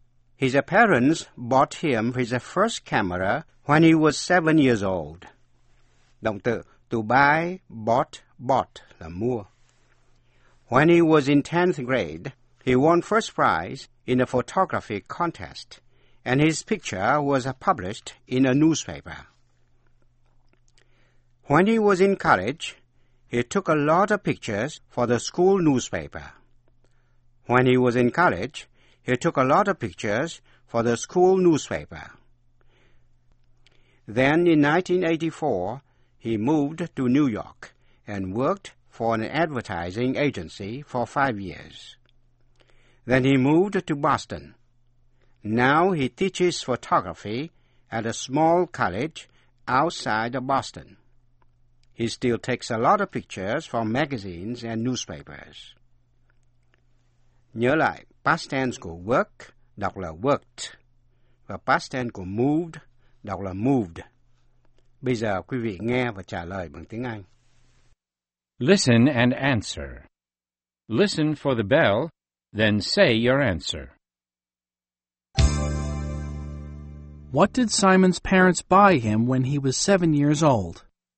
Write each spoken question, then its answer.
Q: What did Simon's parents buy him when he was 7 years old?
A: They bought him a camera.